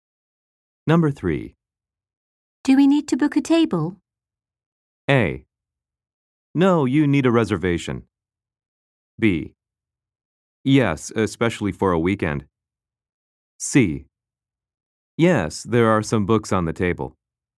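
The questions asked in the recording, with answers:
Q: Do we need to book a table?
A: B: Yes, especially for a weekend.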